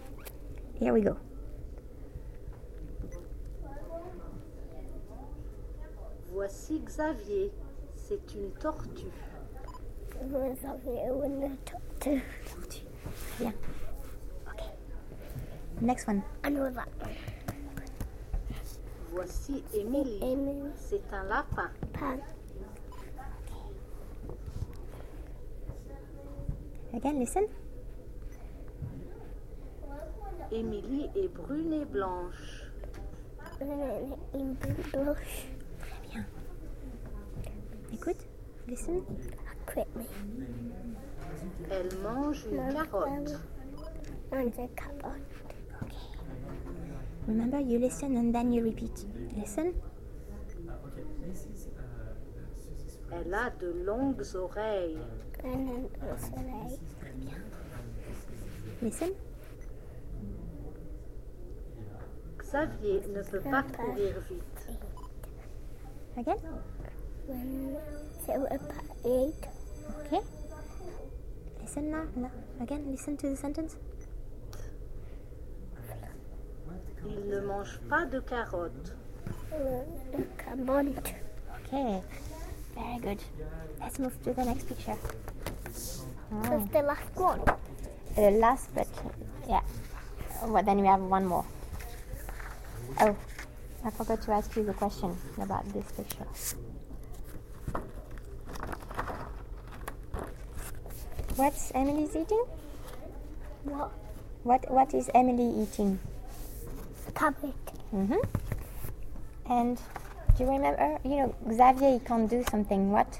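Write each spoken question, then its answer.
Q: What is Emily eating?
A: A carrot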